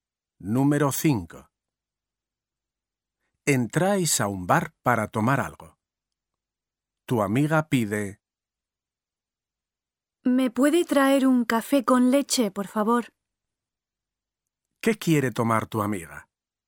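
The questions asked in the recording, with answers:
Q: ¿Qué quiere tomar tu amiga?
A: un café con leche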